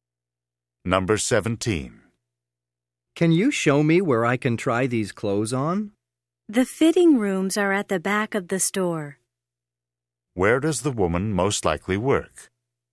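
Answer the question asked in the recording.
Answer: In a clothing store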